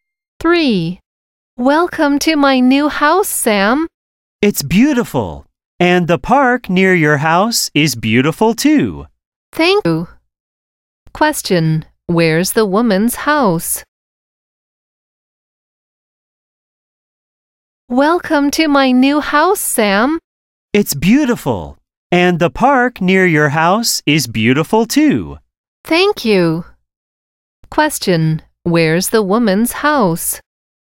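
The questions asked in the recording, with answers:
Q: where's the woman's house?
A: Near the park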